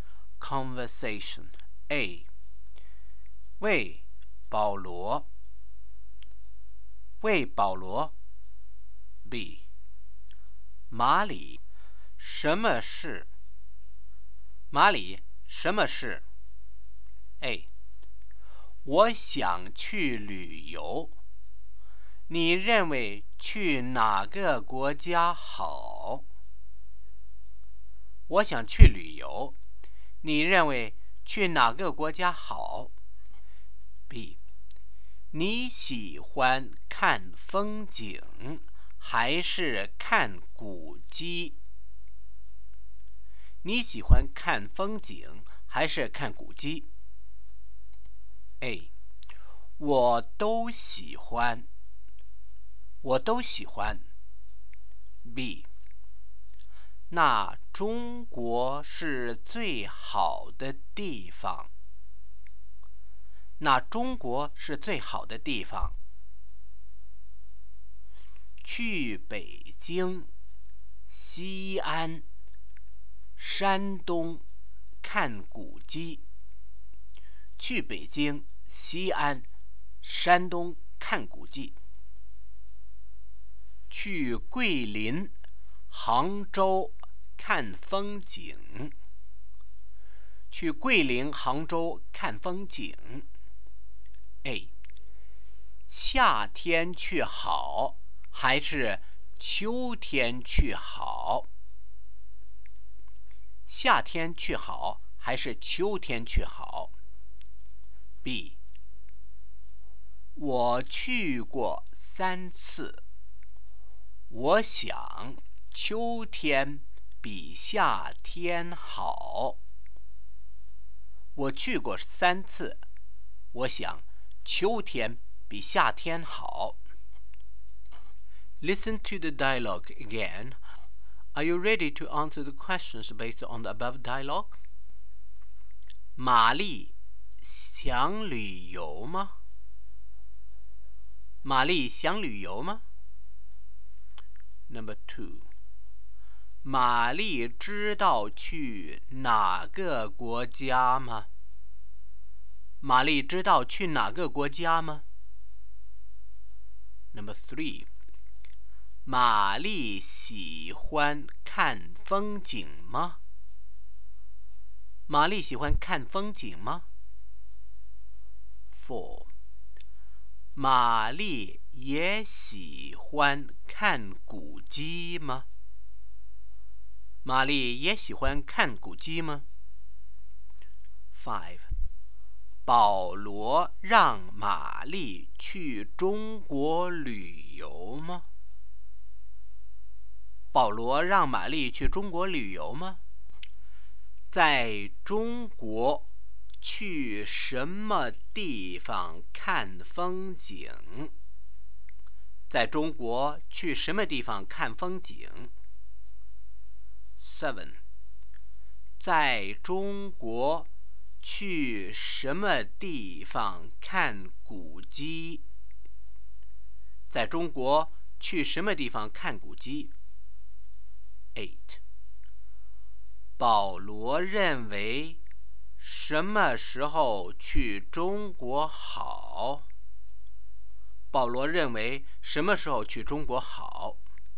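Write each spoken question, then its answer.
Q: 玛丽想旅游吗?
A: 想,玛丽想去旅游。

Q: 玛丽知道去哪个国家吗?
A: 不知道。

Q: 玛丽喜欢看风景吗?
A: 喜欢。

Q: 玛丽也喜欢看古迹吗?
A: 也喜欢。

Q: 保罗让玛丽去中国旅游吗?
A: 是,保罗让她去中国。

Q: 在中国去什么地方看风景?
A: 桂林、杭州

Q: 在中国去什么地方看古迹?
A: 北京、西安、山东

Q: 保罗认为什么时候去中国好?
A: 秋天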